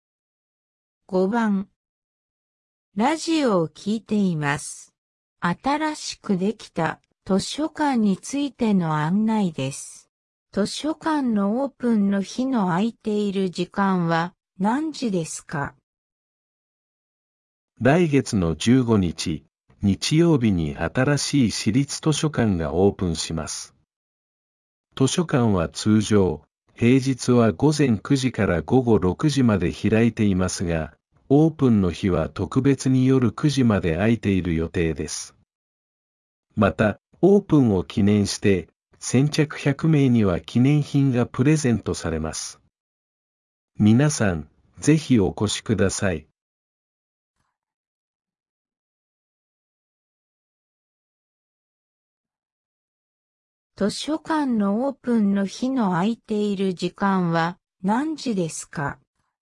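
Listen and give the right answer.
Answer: 午前9時から夜9時まで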